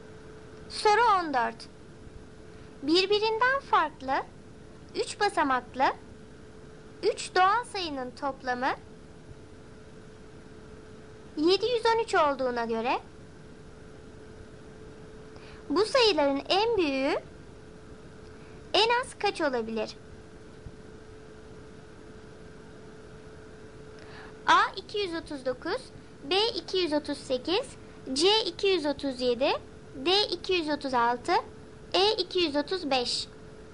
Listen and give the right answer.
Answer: Doğru cevap A 239.